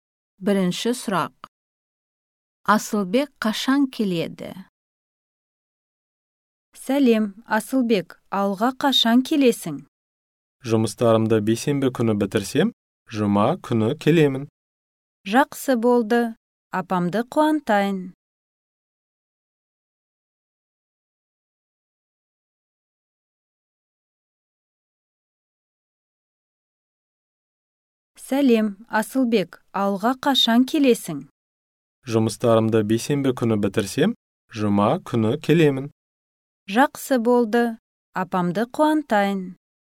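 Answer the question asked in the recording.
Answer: Жұма күні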